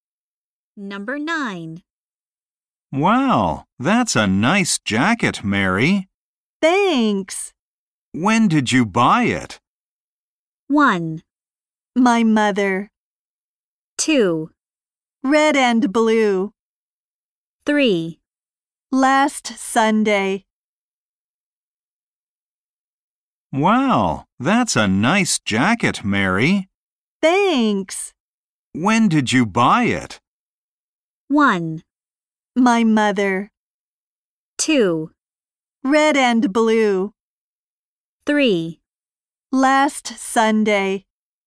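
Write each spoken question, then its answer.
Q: When did you buy it?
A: 3: Last Sunday.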